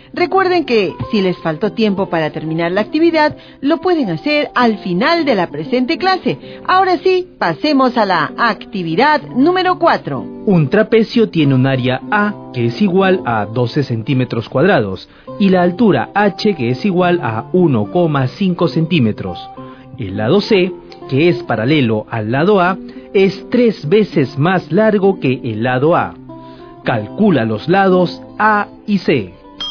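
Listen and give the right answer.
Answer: A = 4 cm, C = 12 cm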